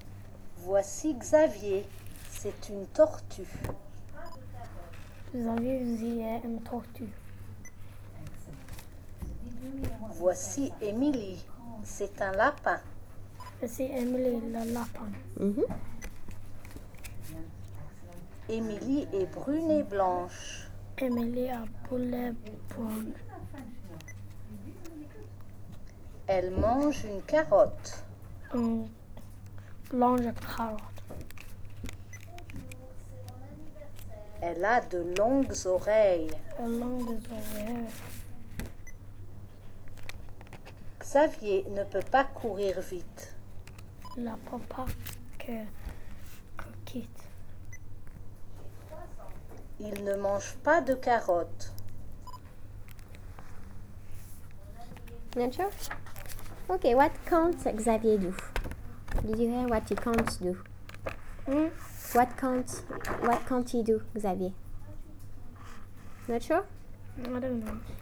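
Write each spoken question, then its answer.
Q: Okay, what can't Xavier do?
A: Run fast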